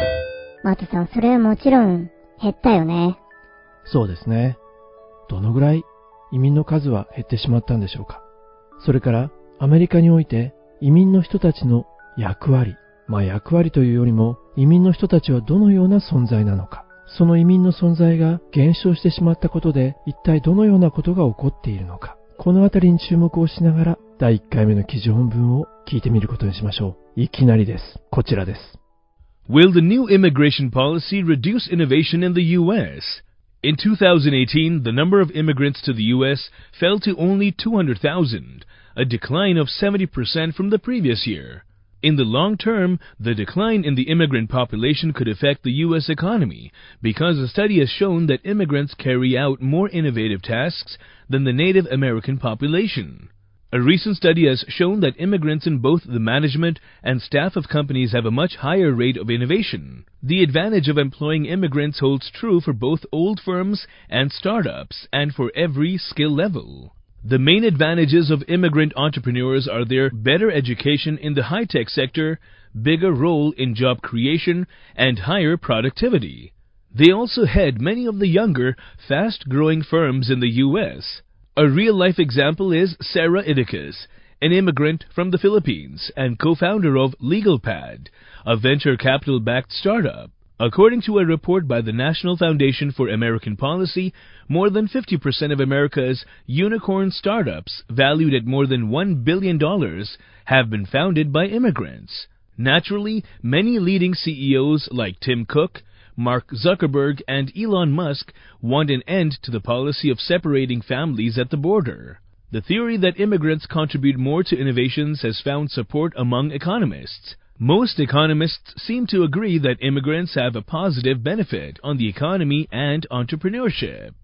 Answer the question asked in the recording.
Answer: 前年比で 70% 減少したというんですね。